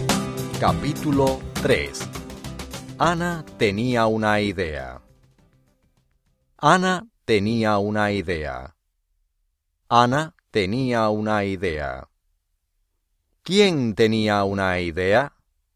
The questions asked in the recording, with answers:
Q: ¿Quién tenía una idea?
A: Ana.